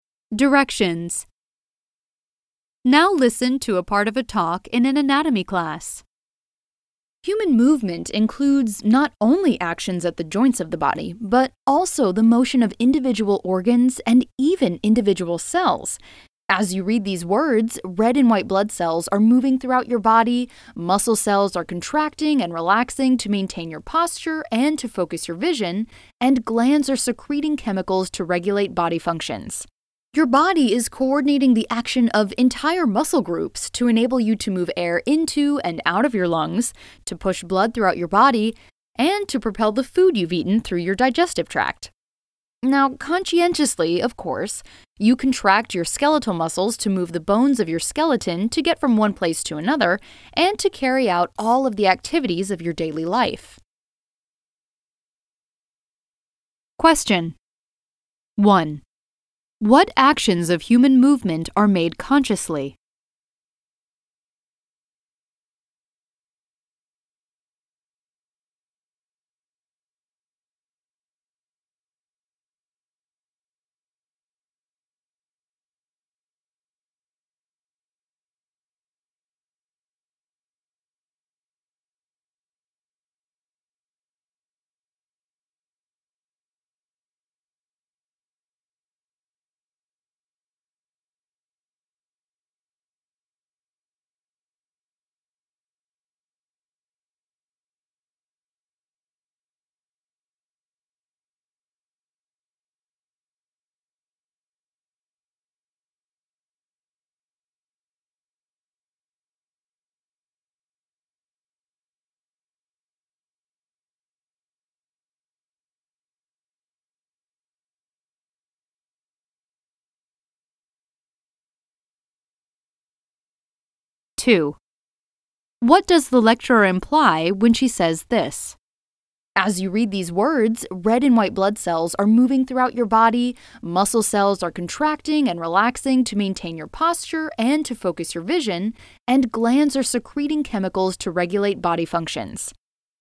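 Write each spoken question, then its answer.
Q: What actions of human movement are made consciously?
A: Contracting skeletal muscles to move the bones of the skeleton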